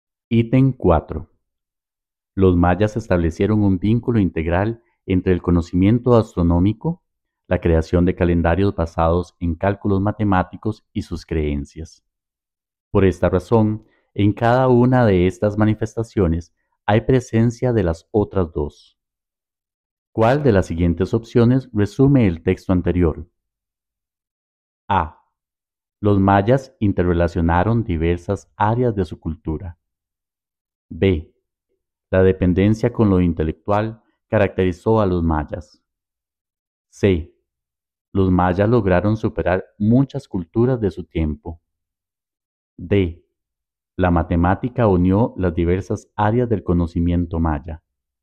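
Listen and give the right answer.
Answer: A: Los mayas interrelacionaron diversas áreas de su cultura.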